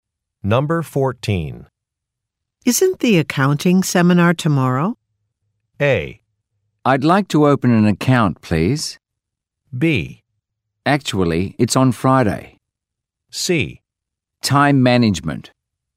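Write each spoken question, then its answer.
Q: Isn't the accounting seminar tomorrow?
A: B: Actually, it's on Friday.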